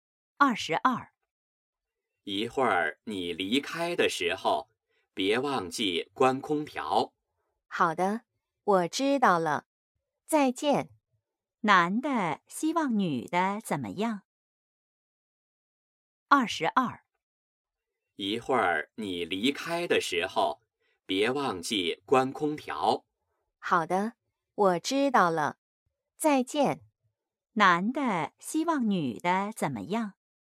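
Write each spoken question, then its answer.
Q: 男的希望女的怎么样?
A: 离开时关空调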